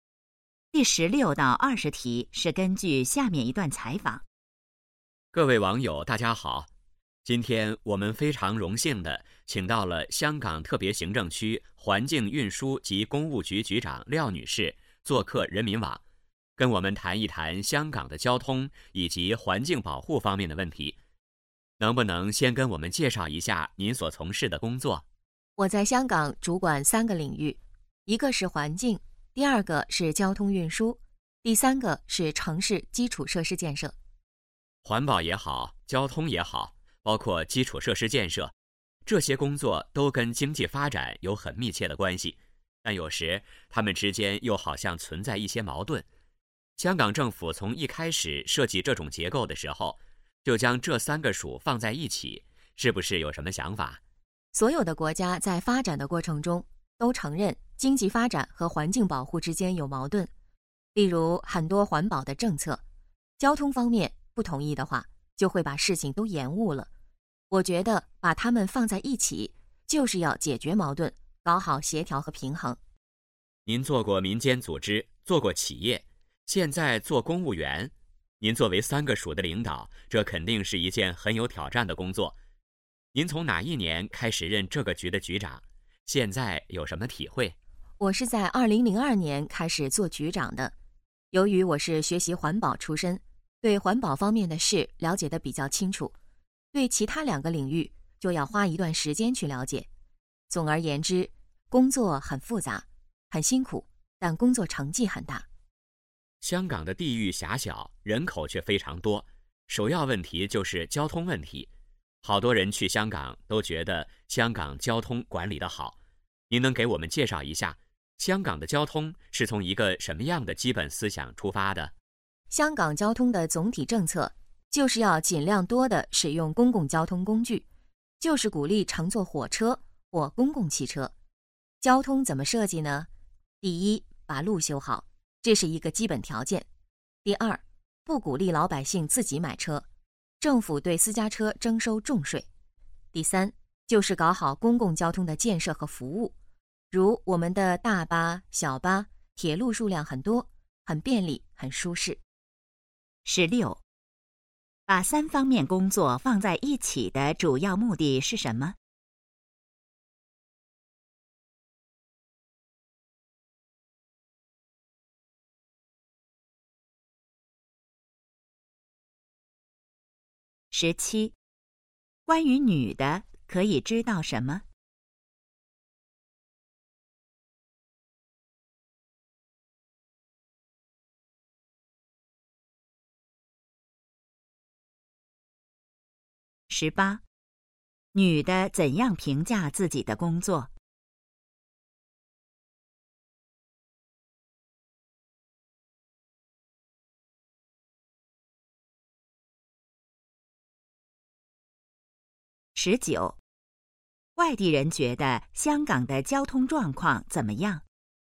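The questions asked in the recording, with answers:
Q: 把三方面工作放在一起的主要目的是什么?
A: 解决矛盾,搞好协调和平衡

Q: 女的怎样评价自己的工作?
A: 工作很复杂很辛苦,但成绩很大

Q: 外地人觉得香港的交通状况怎么样?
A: 管理得好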